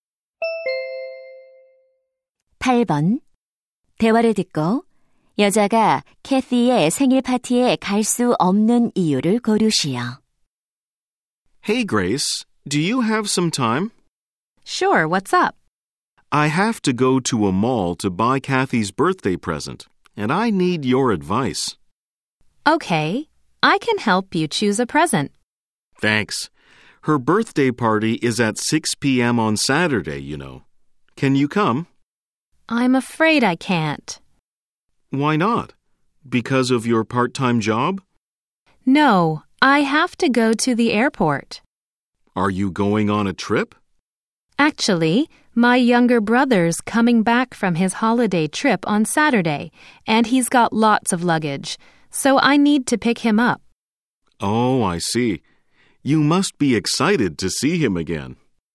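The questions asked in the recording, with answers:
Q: 대화를 듣고 여자가 캐티의 생일 파티에 갈 수 없는 이유를 고르시오.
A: 남동생을 데리러 공항에 가야 해서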